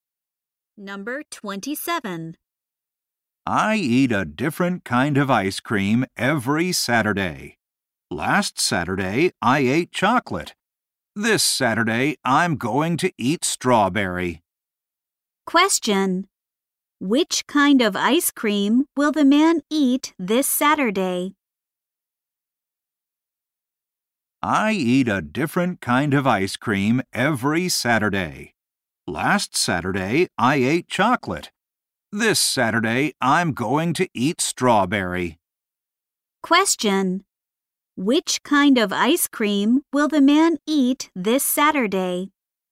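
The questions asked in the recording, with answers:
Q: Question. Which kind of ice cream will the man eat this Saturday?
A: Strawberry.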